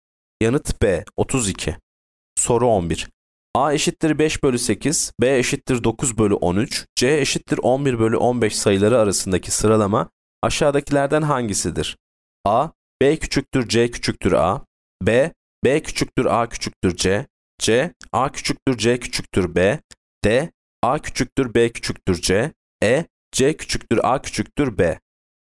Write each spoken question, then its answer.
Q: A eşittir 5 bölü 8, B eşittir 9 bölü 13, C eşittir 11 bölü 15 sayıları arasındaki sıralama aşağıdakilerden hangisidir?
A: Yanıt D. A küçüktür B küçüktür C.